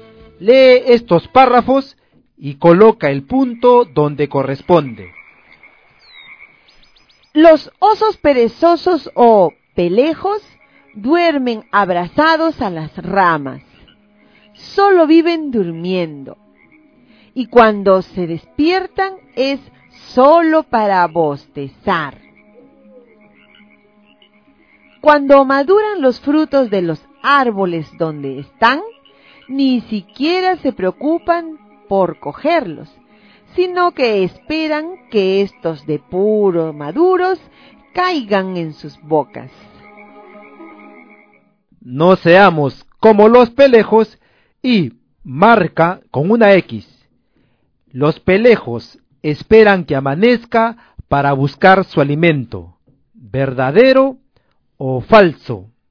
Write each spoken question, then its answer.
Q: Los pelejos esperan que amanezca para buscar su alimento, verdadero o falso.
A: falso.